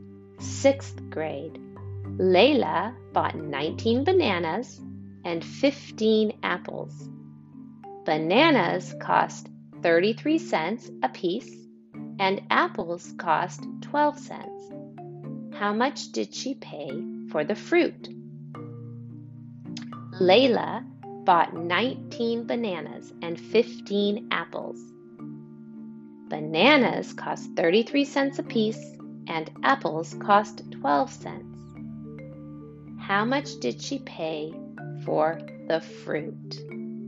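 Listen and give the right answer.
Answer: $8.07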